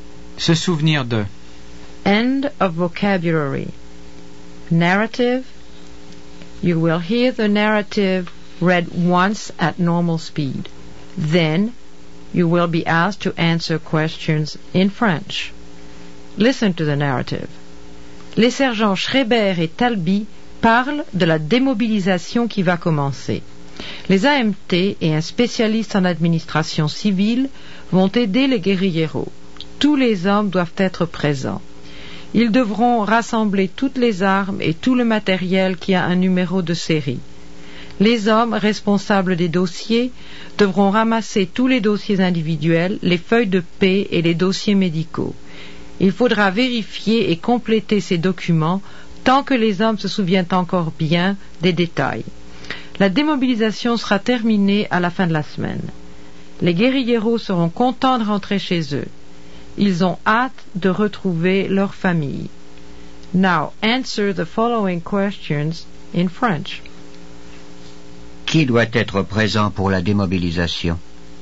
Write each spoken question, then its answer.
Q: Qui doit être présent pour la démobilisation?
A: Tous les hommes doivent être présents.